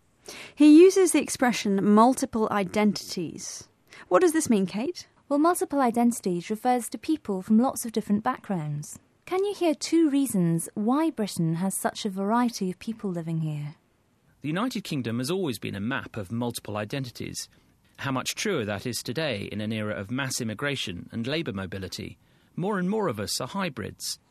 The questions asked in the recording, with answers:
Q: Can you hear two reasons why Britain has such a variety of people living here?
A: Matthew D'Ancona said we're living in an era of mass immigration and labour mobility.